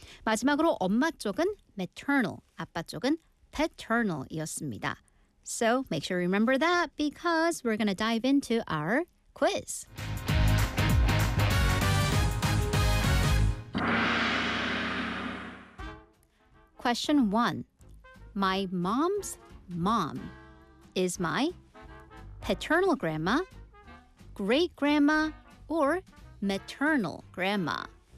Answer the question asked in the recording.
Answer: 자, 엄마의 엄마, maternal grandma였습니다.